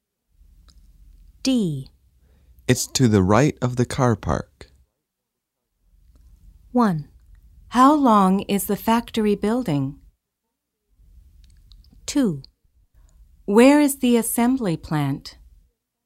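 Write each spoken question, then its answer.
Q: It's to the right of the car park.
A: 2: Where is the assembly plant?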